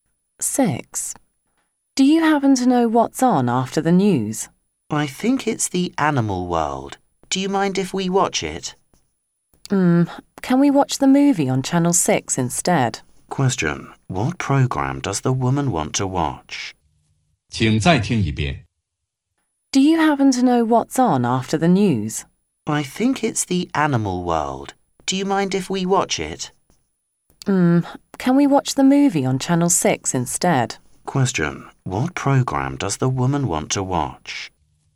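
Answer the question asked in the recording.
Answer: The movie on Channel 6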